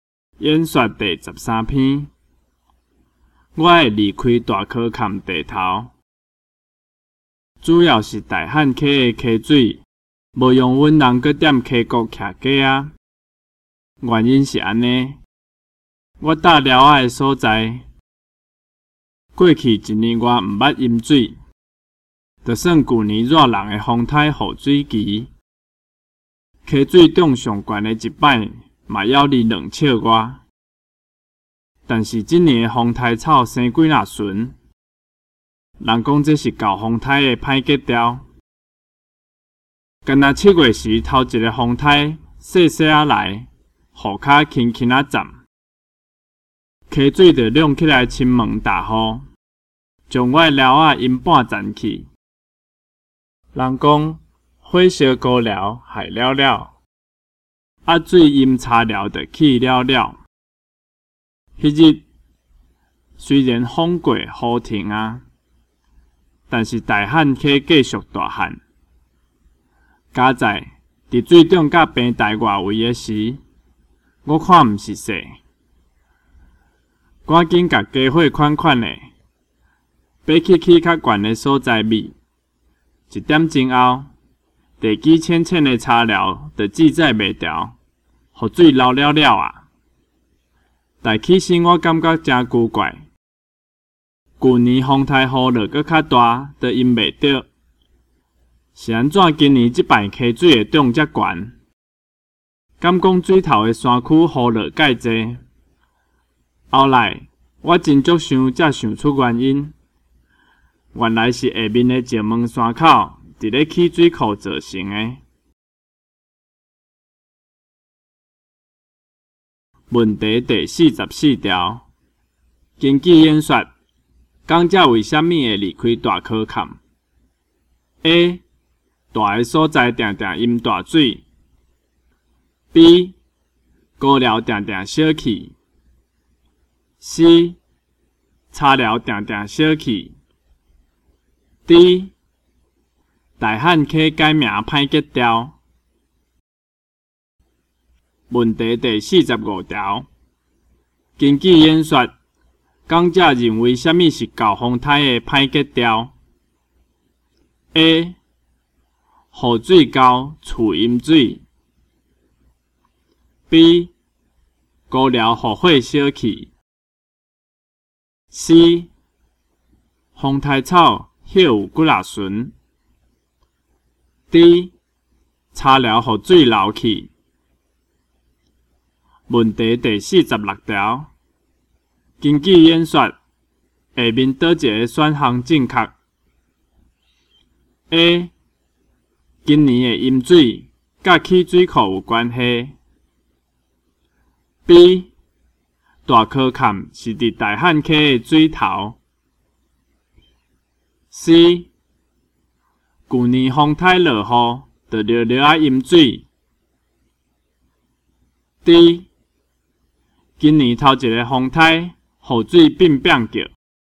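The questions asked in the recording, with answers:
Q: 根据演说,讲者认为什么是搞风台的歹吉兆 ?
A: C: 风台草歇有几若顺

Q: 根据演说,下面倒一个选项正确 ?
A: A: 今年的淹水甲起水库有关系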